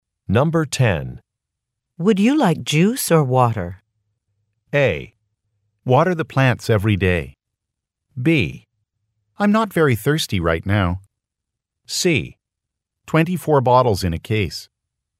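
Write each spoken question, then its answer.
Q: Would you like juice or water?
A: B: I'm not very thirsty right now.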